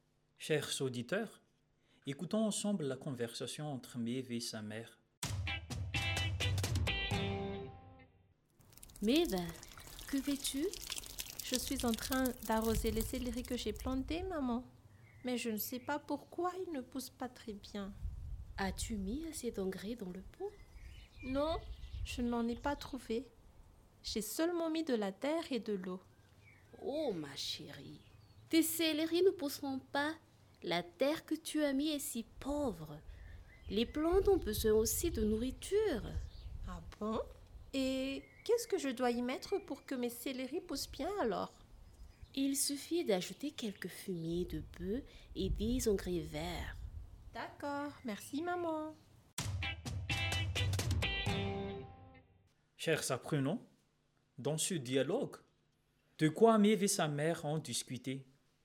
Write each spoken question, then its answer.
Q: Chers apprenants, dans ce dialogue, de quoi Maeve et sa mère ont discuté?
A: Exact. Elles ont parlé du céleri que Maeve a planté, mais qui n'a pas poussé, et sa mère lui a donné quelques conseils pour qu'il pousse.